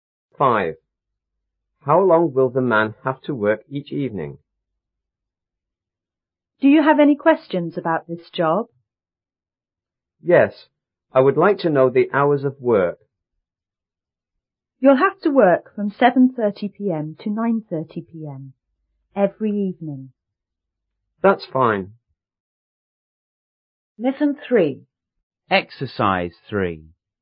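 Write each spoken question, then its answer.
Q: How long will the man have to work each evening?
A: Two hours (7:30 to 9:30 p.m.)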